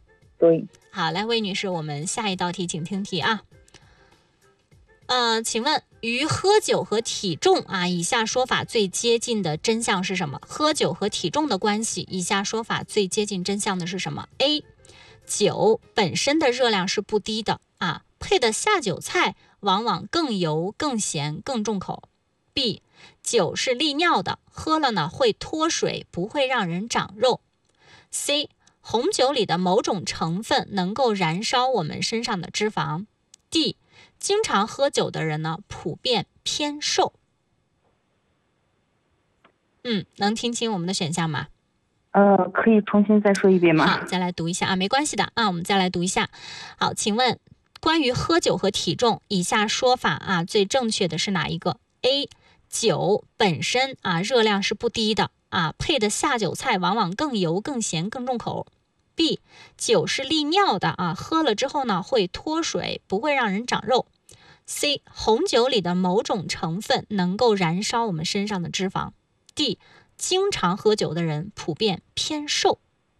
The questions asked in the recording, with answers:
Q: 请问与喝酒和体重啊,以下说法最接近的真相是什么?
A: 正确答案就是 A 啊